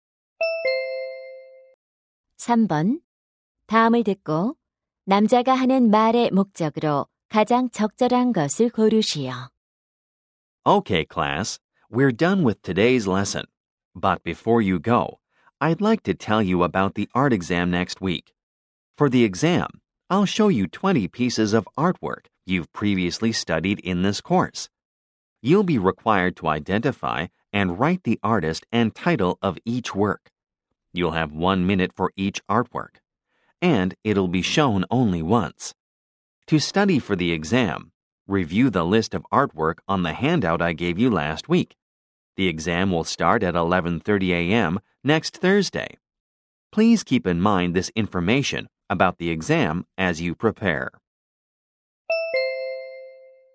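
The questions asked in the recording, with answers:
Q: 다음을 듣고 남자가 하는 말의 목적으로 가장 적절한 것을 고르시오.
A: 다음 주 미술 시험에 대해 안내하려고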